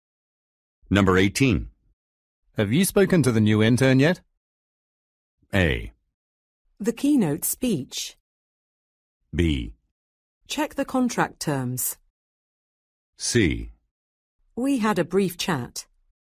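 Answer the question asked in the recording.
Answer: C: We had a brief chat.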